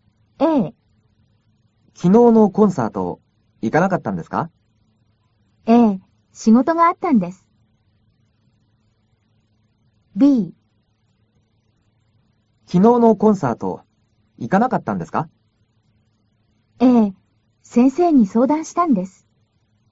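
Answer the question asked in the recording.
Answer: A: ええ、仕事があったんです。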